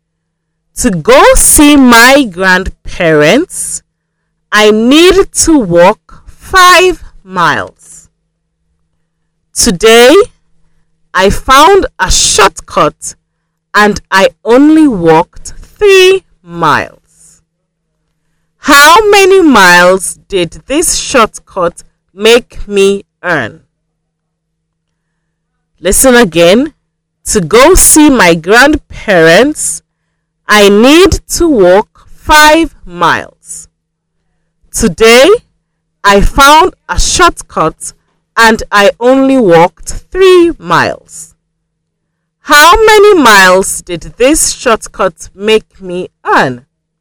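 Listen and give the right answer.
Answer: 2 miles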